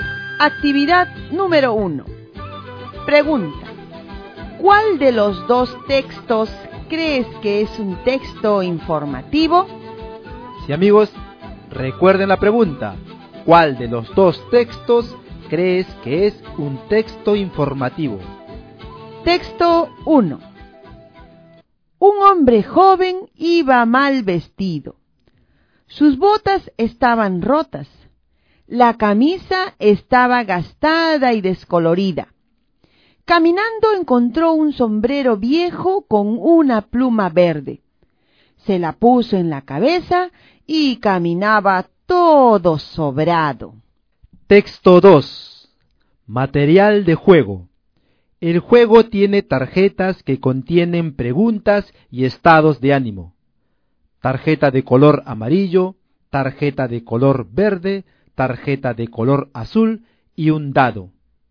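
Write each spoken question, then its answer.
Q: ¿Cuál de los dos textos crees que es un texto informativo?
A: Texto 2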